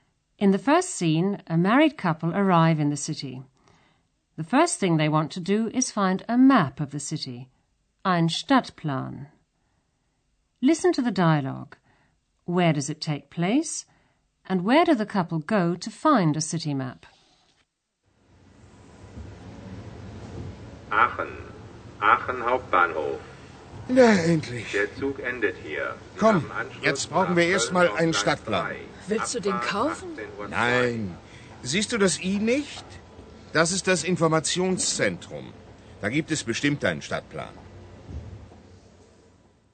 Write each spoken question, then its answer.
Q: Where does it take place?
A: As you probably guessed from the loudspeaker announcement, the scene is taking place at the main station in Aachen.

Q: And where do the couple go to find a city map?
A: Like most main stations in Germany, it has an information center where you can get a map of the city.